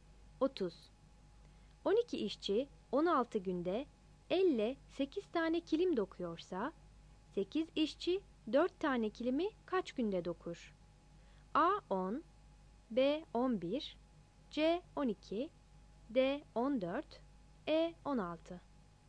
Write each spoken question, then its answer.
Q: 12 işçi 16 günde elle 8 tane kilim dokuyorsa, 8 işçi 4 tane kilimi kaç günde dokur?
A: 30 C